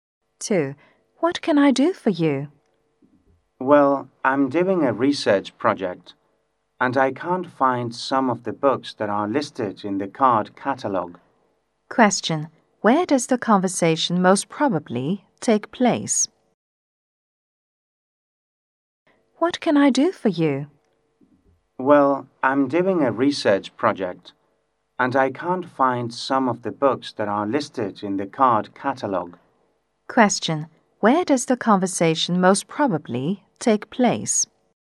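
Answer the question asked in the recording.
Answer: In a library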